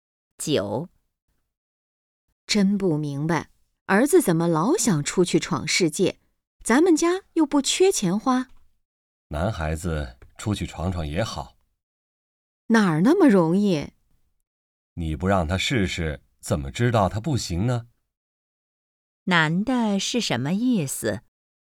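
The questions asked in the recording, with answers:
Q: 男的是什么意思?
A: 应该让儿子出去试试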